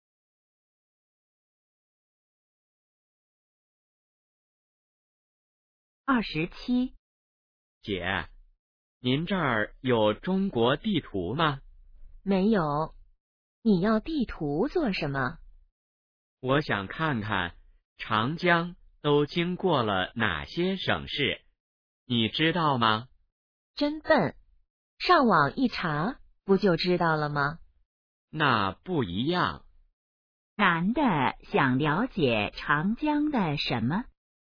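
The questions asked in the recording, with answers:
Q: 男的想了解长江的什么?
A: 经过哪些省市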